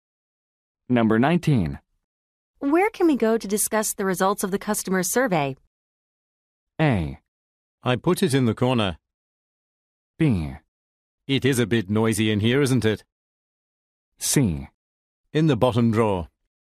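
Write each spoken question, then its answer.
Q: Where can we go to discuss the results of the customer survey?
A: B: It is a bit noisy in here, isn't it?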